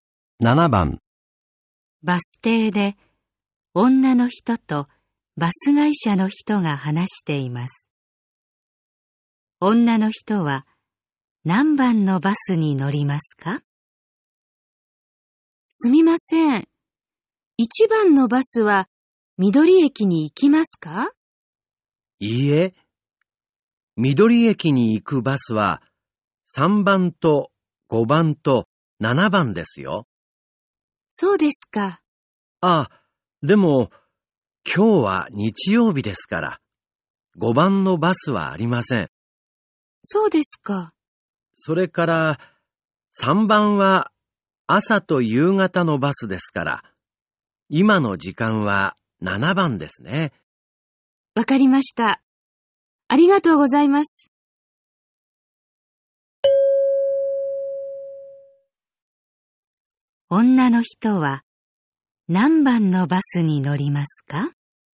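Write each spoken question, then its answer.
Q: 女の人は何番のバスに乗りますか?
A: 7番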